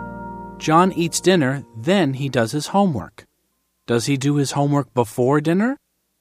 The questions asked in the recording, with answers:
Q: Does he do his homework before dinner?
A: No, he doesn't. He does his homework after dinner.